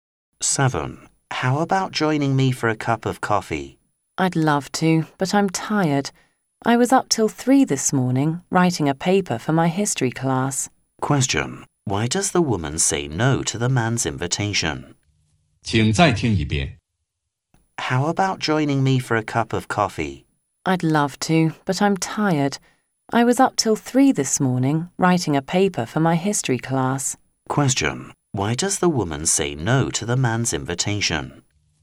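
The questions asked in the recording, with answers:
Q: Why does the woman say no to the man's invitation?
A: She is tired because she stayed up till 3 writing a paper.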